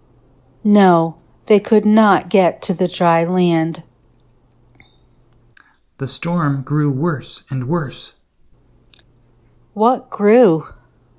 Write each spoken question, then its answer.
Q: What grew?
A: The storm grew.